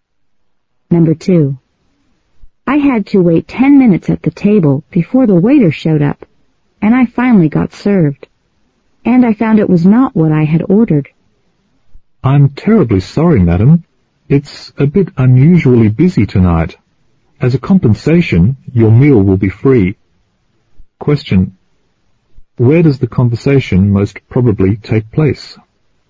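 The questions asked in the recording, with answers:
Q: Where does the conversation most probably take place?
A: In a restaurant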